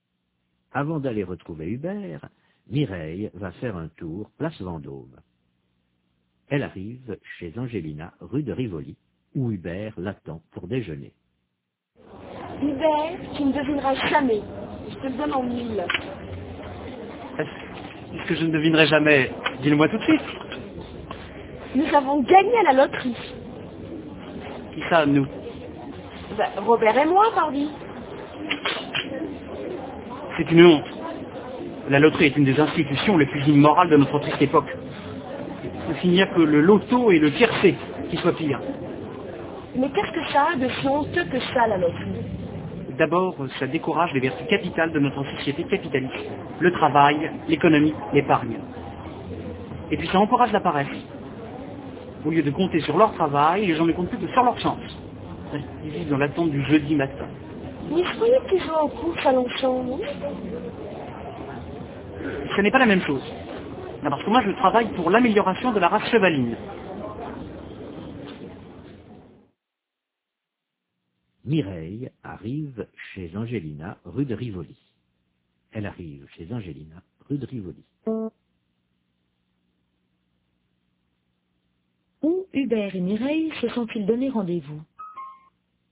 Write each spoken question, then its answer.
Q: Où Hubert et Mireille se sont-ils donné rendez-vous?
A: Chez Angelina, rue de Rivoli.